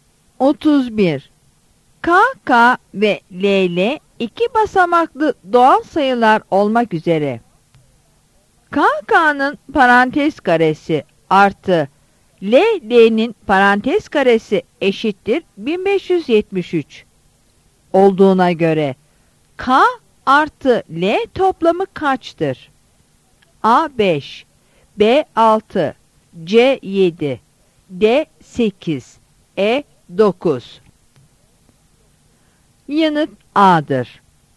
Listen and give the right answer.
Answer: Yanıt A'dır.